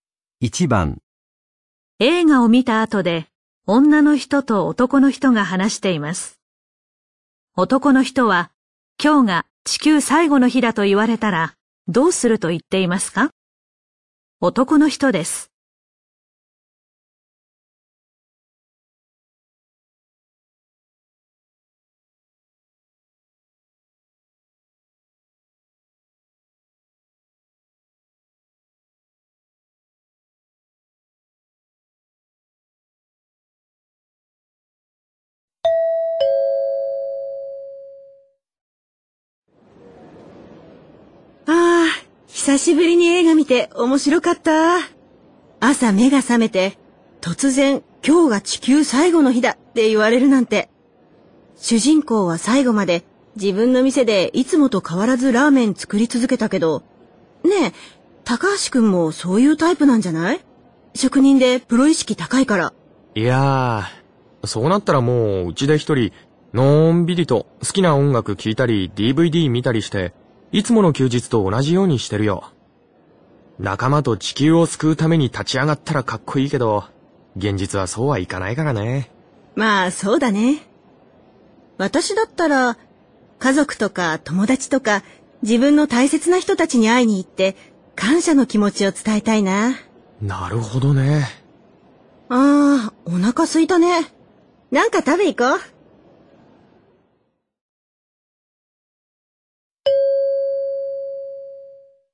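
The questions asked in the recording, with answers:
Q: 男の人は、今日が地球最後の日だと言われたら、どうすると言っていますか?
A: 家で一人のんびり音楽やDVDを楽しみ、いつもの休日と同じように過ごす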